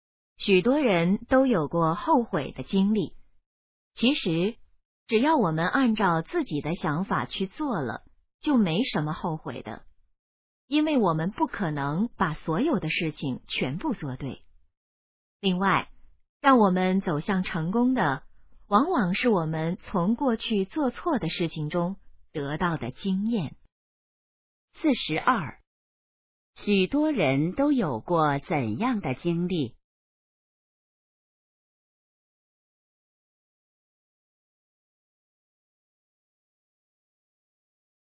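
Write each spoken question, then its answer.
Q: 许多人都有过怎样的经历?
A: 后悔的经历

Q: 什么能帮助我们走向成功?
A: 从过去做错的事情中得到的经验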